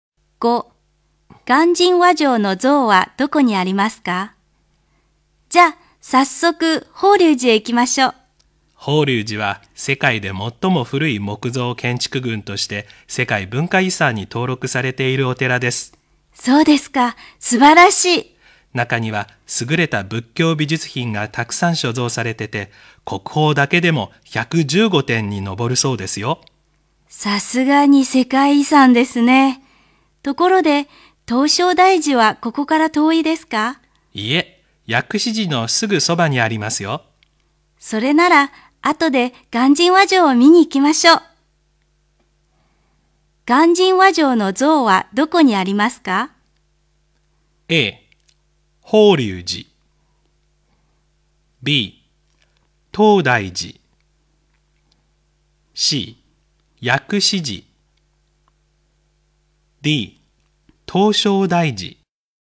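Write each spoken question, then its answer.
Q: 鑑真和上の像はどこにありますか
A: D: 唐招提寺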